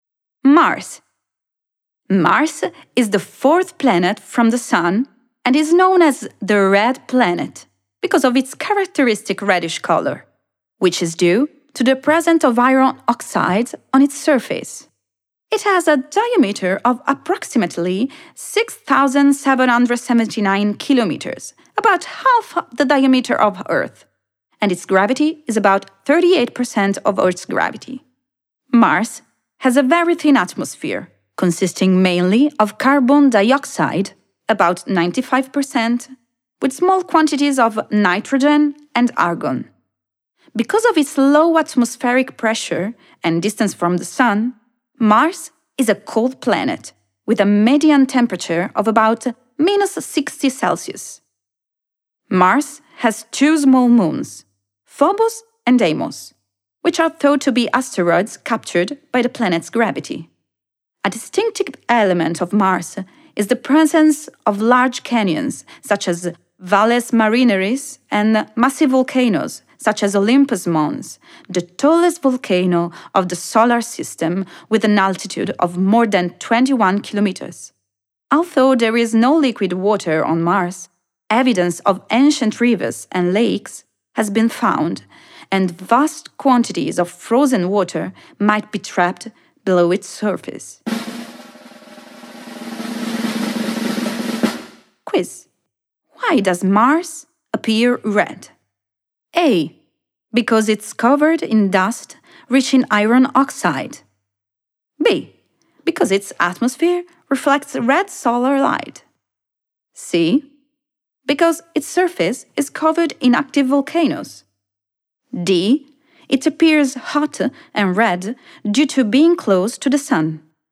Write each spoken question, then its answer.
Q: Why does Mars appear red?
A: And the correct answer is A. Because it is covered in dust rich in iron oxide.